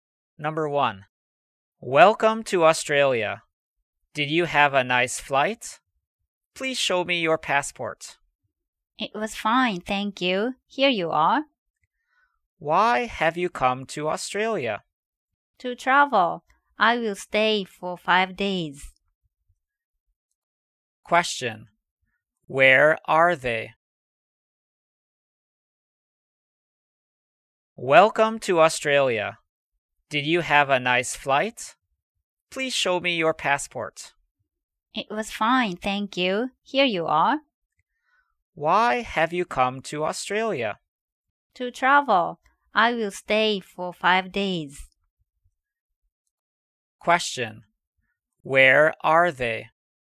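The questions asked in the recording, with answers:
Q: Where are they?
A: At an airport in Australia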